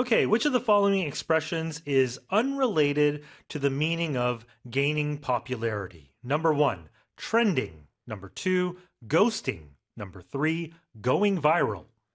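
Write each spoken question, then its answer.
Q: Okay, which of the following expressions is unrelated to the meaning of gaining popularity?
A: 2: ghosting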